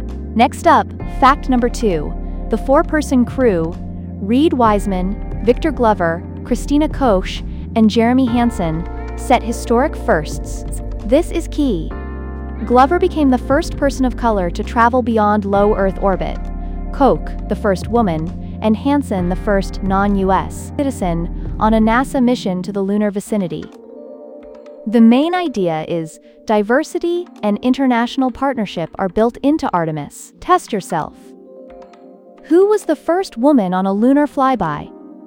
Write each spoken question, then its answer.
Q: Who was the first woman on a lunar flyby?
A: Correct answer, Christina Koch.